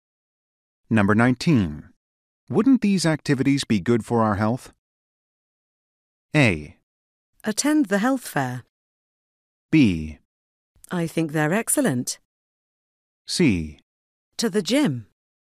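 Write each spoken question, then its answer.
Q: Wouldn't these activities be good for our health?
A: B: I think they're excellent.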